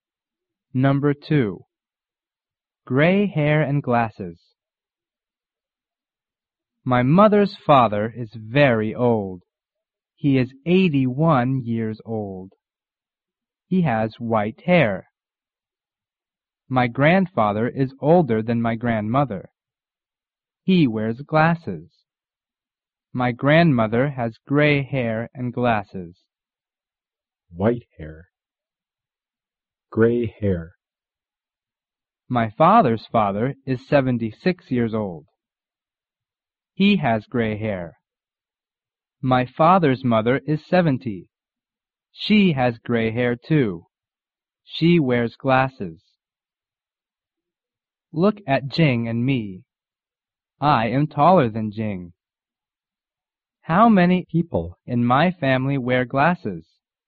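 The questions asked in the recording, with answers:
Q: How many people in my family wear glasses?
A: Three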